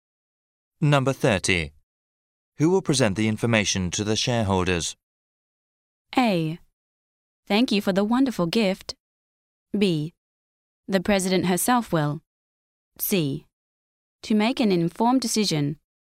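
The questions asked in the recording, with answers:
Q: Who will present the information to the shareholders?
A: B: The president herself will.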